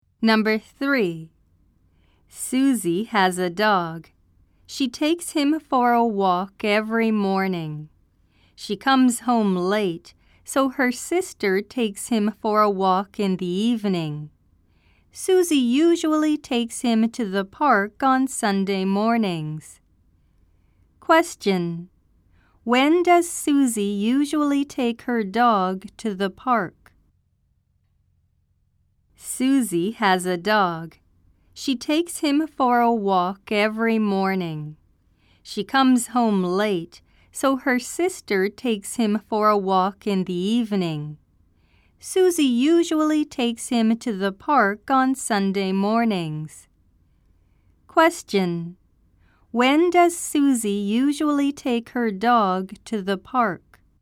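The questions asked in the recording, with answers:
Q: When does Susie usually take her dog to the park?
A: On Sunday mornings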